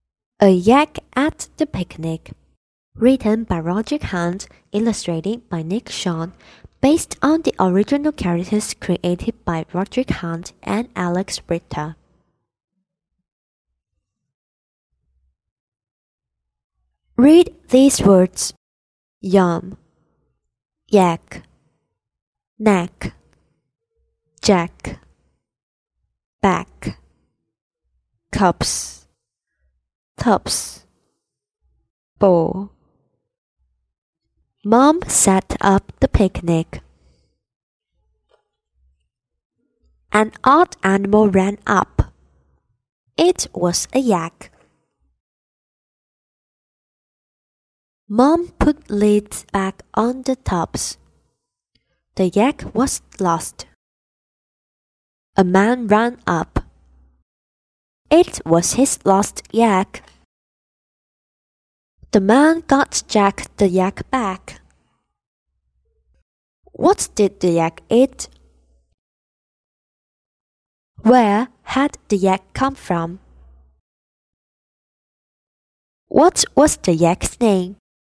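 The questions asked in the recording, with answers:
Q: What was the yak's name?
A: Jack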